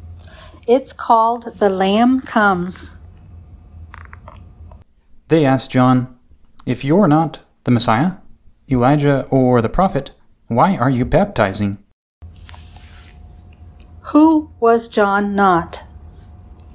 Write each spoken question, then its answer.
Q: Who was John not?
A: John was not the Messiah, Elijah, or the prophet.